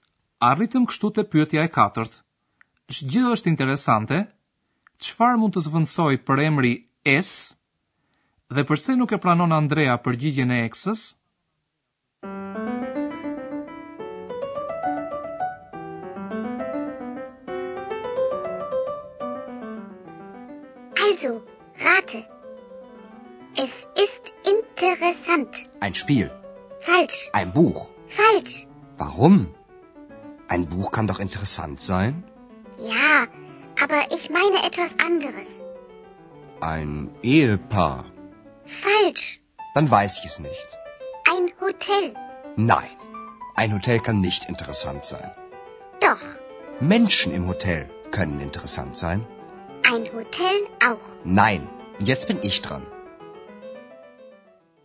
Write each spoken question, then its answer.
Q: Shë gjithë është interesante, qëfar mund të zvëndsoj për emri es, dhe përse nuk e pranon Andrea përgjigjen e eksës?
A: Përgjigja e dur do të ishte që interesant është hoteli, por Andreas kjo nuk i duket shumë e sakt.